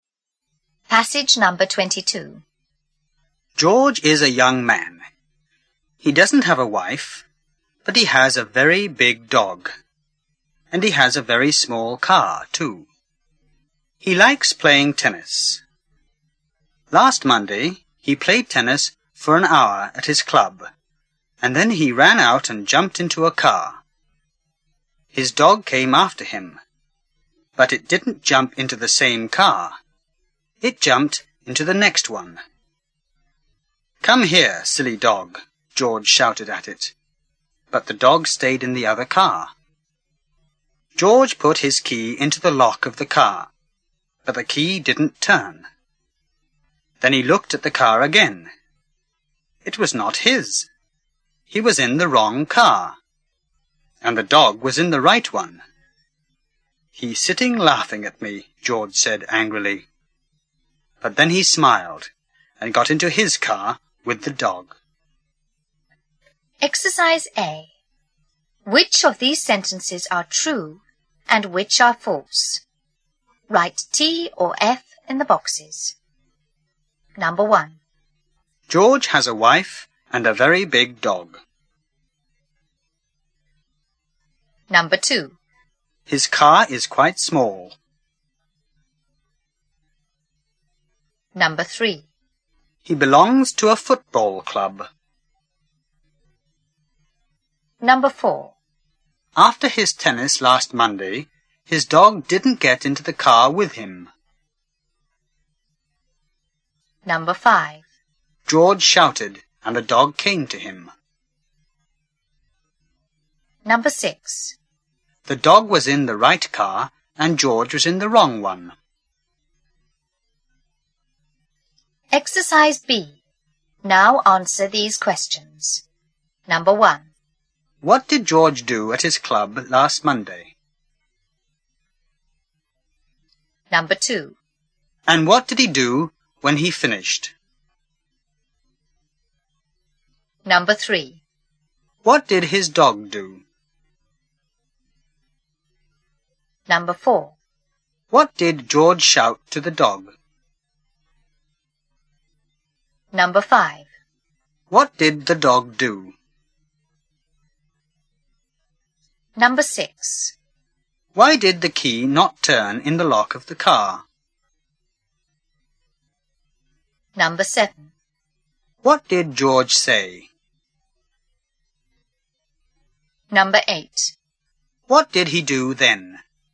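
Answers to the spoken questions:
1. False
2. True
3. False
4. True
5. False
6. True
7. He played tennis for an hour.
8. He ran out and jumped into a car.
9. It came after him and jumped into the next car.
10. "Come here, silly dog."
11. It stayed in the other car.
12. Because it was not his car.
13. "He's sitting laughing at me."
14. He smiled and got into his car with the dog.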